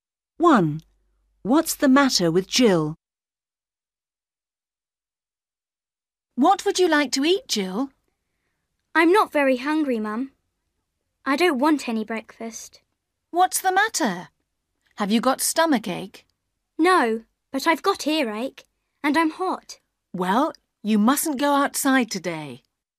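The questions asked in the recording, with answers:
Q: What's the matter with Jill?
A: She has earache and is hot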